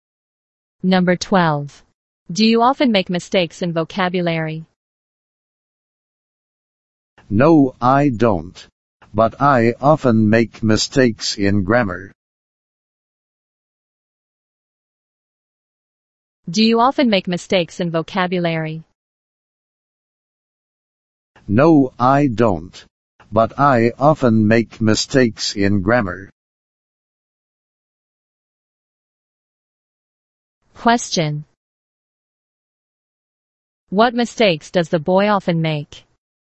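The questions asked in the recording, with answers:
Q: What mistakes does the boy often make?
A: Mistakes in grammar.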